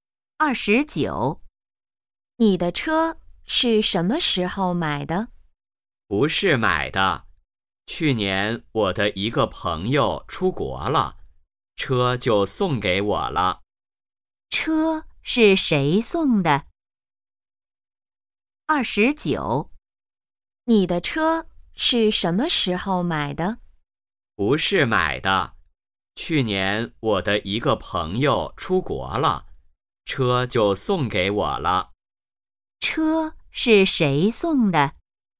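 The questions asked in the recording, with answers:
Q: 车是谁送的?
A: 朋友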